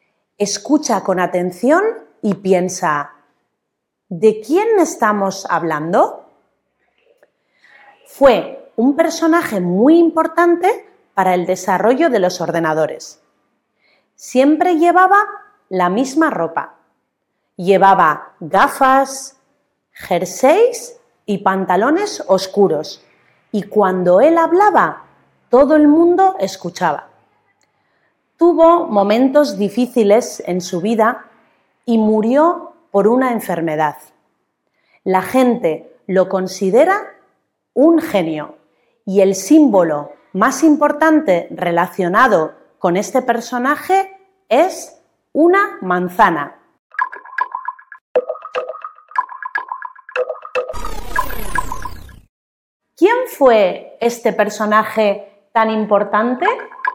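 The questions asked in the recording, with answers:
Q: ¿Quién fue este personaje tan importante?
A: Steve Jobs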